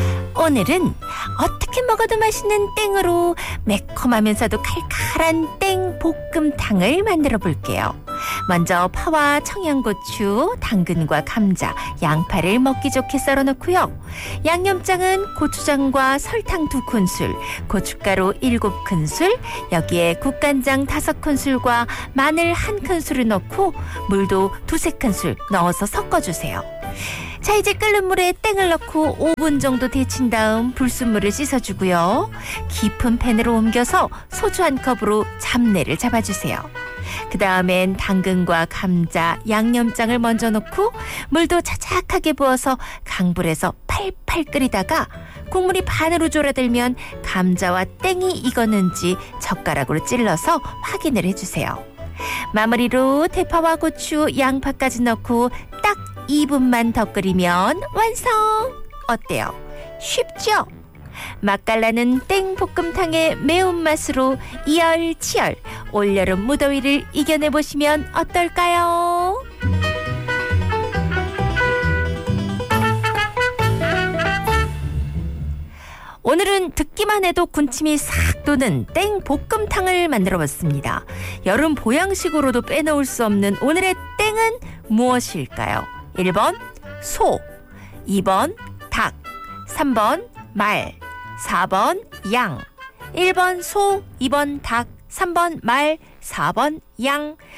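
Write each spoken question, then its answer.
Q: 여름 보양식으로도 빼놓을 수 없는 오늘의 땡은 무엇일까요?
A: 2: 닭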